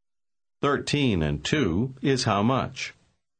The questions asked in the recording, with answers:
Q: Thirteen and two is how much?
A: Fifteen.